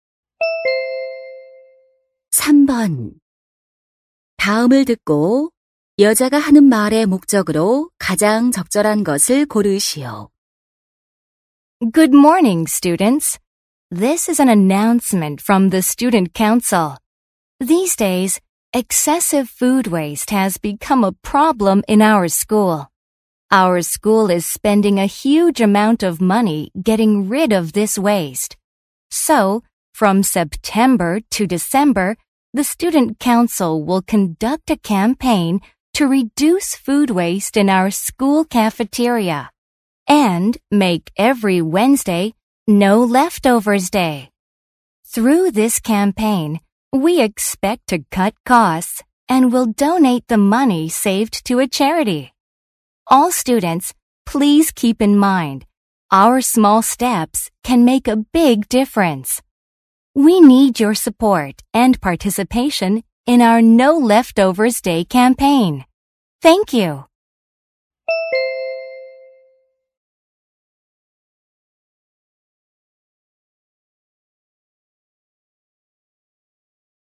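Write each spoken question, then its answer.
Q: 다음을 듣고 여자가 하는 말의 목적으로 가장 적절한 것을 고르시오.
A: 음식물 쓰레기 줄이기 캠페인(No Leftovers Day) 참여를 독려하려고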